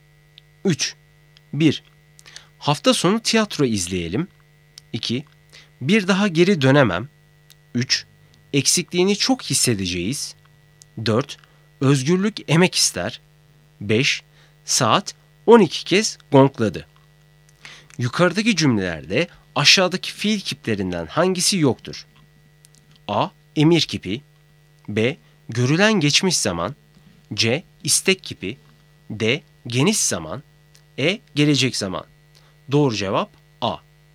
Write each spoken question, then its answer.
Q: Yukarıdaki cümlelerde aşağıdaki fiil kiplerinden hangisi yoktur?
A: Doğru cevap A.